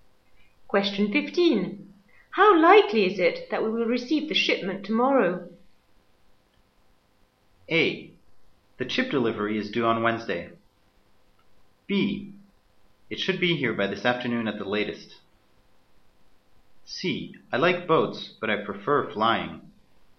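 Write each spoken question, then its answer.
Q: How likely is it that we will receive the shipment tomorrow?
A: B: It should be here by this afternoon at the latest.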